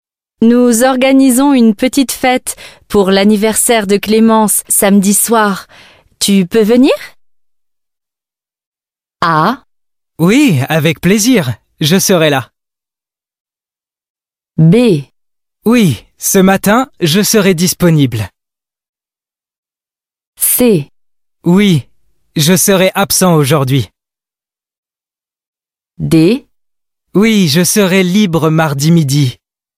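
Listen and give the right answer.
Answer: A: Oui, avec plaisir. Je serai là.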